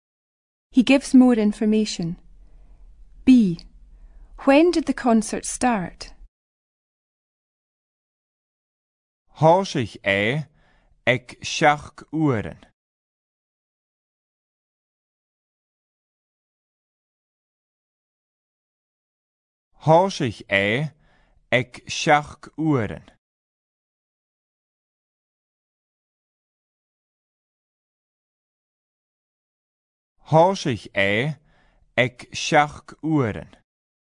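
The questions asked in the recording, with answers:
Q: When did the concert start?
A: At 6 o'clock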